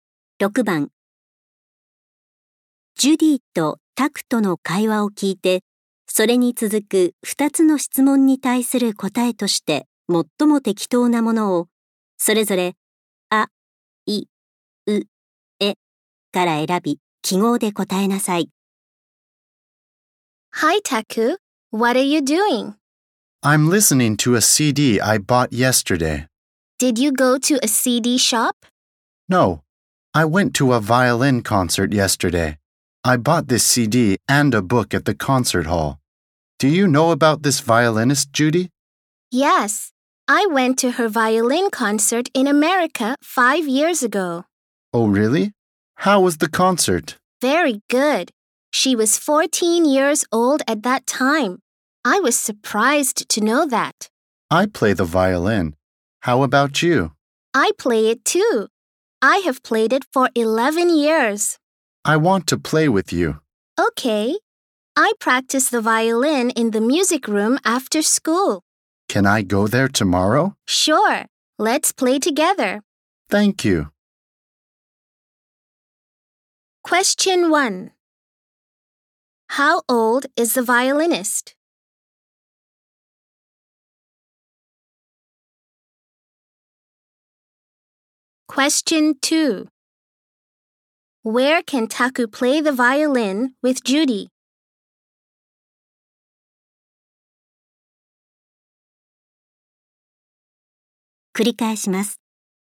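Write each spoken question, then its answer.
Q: How old is the violinist?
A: 19 years old

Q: Where can Taku play the violin with Judy?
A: In the music room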